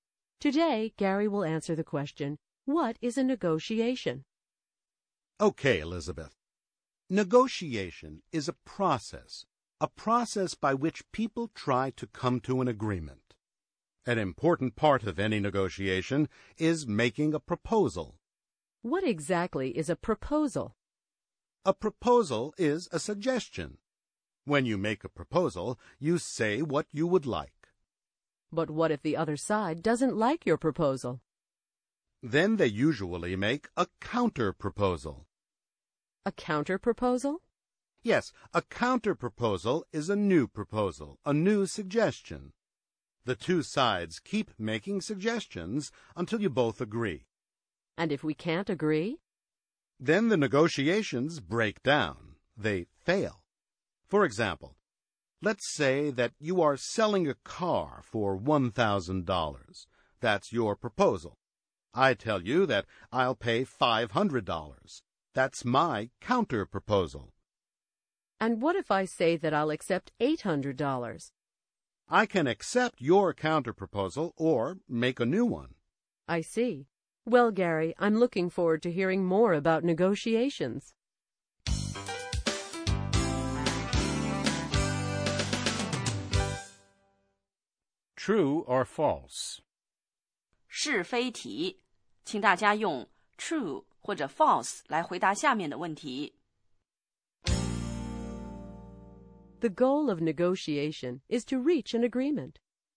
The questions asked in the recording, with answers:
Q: The goal of negotiation is to reach an agreement.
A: True. People offer proposals and counterproposals in an attempt to reach an agreement.